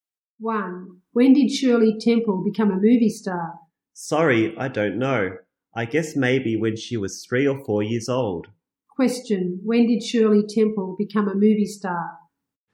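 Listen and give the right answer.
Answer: When she was 3 or 4 years old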